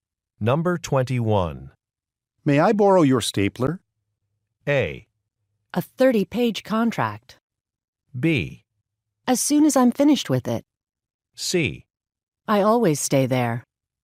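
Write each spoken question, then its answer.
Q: May I borrow your stapler?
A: B: As soon as I'm finished with it.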